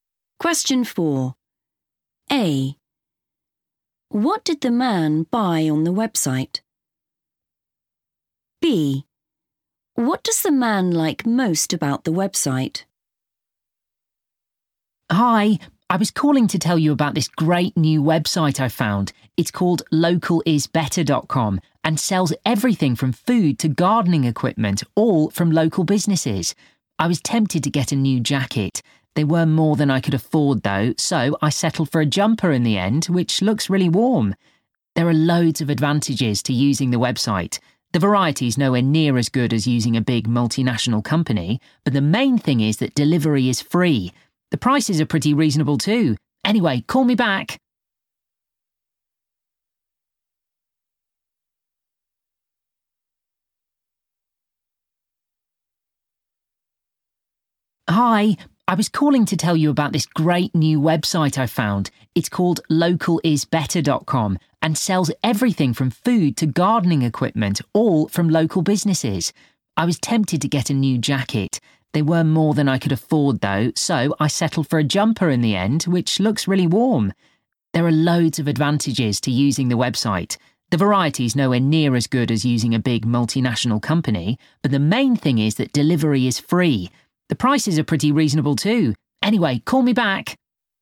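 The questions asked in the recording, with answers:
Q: What did the man buy on the website?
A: a jumper

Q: What does the man like most about the website?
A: free delivery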